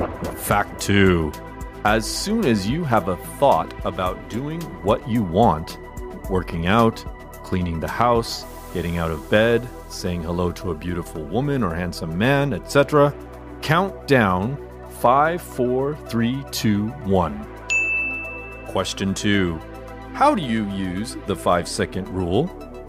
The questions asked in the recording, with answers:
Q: How do you use the 5 second rule?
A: As soon as you have a thought about doing what you want, working out, cleaning the house, getting out of bed, saying hello to a beautiful woman or handsome man, etc., count down 5, 4, 3, 2, 1 and do it!